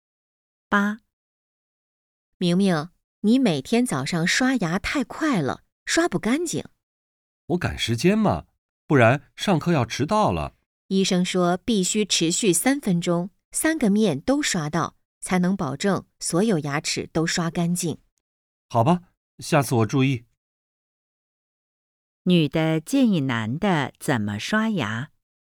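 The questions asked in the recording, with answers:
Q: 女的建议男的怎么刷牙。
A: 刷三分钟,三个面都刷到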